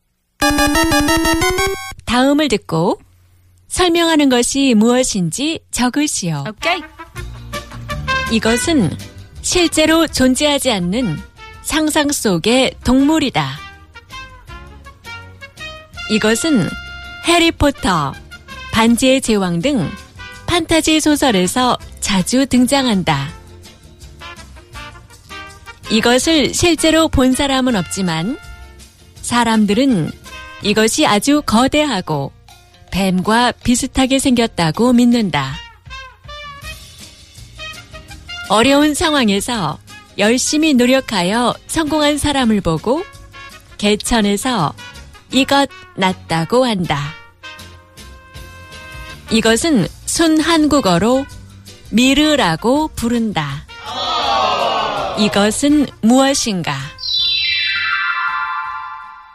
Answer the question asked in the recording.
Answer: Yong.